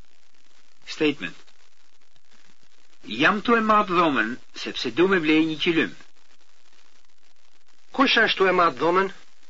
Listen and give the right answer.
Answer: Unë jam tu e matë dhomen.